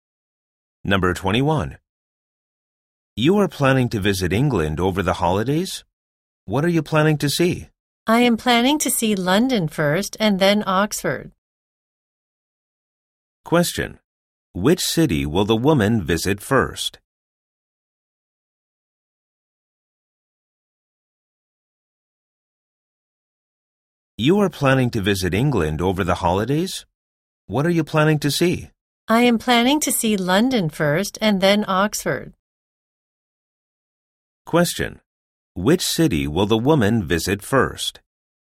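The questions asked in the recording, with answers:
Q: Which city will the woman visit first?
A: London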